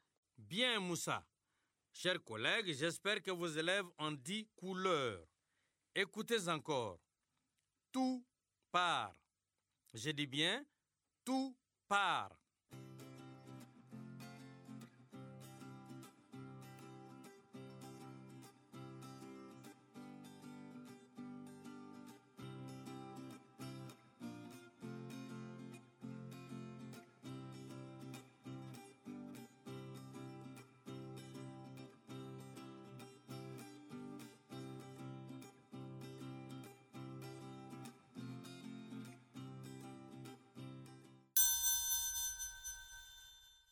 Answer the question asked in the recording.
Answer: C'est partout.